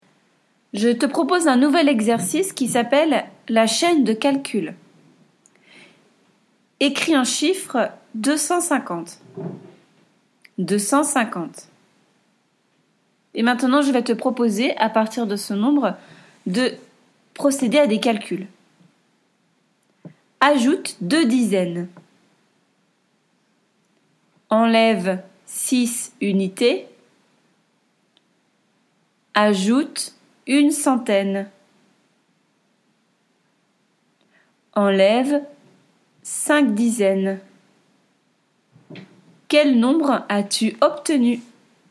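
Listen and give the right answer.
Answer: 314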